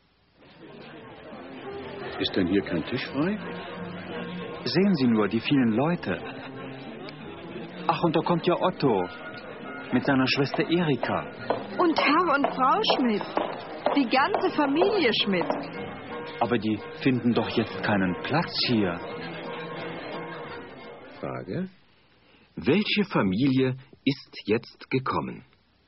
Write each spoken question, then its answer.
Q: Welche Familie ist jetzt gekommen?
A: Die Familie Schmidt ist jetzt gekommen.